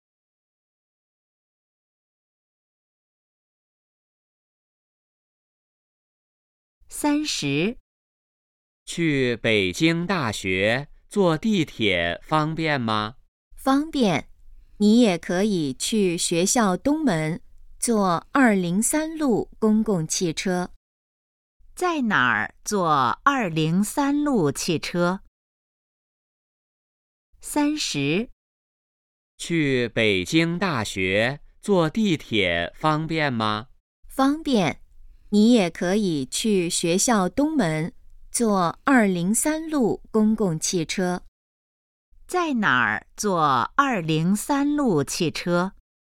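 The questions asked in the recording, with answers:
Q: 在哪儿坐203路汽车?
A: 学校东门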